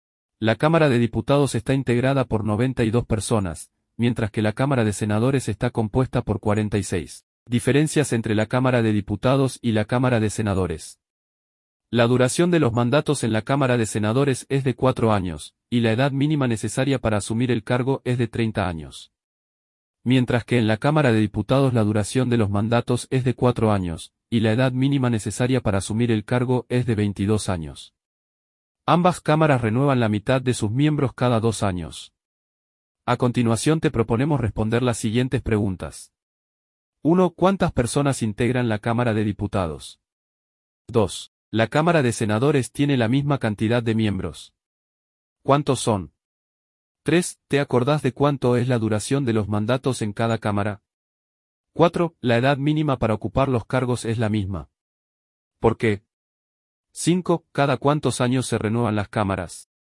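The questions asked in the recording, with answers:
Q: ¿Cuántas personas integran la Cámara de Diputados?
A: 92

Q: ¿La Cámara de Senadores tiene la misma cantidad de miembros?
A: No, tiene 46

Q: ¿Te acordás de cuánto es la duración de los mandatos en cada cámara?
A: 4 años en ambas

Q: ¿La edad mínima para ocupar los cargos es la misma?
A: No: 30 años en Senadores y 22 en Diputados

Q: ¿Cada cuántos años se renuevan las cámaras?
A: Cada 2 años (la mitad de sus miembros)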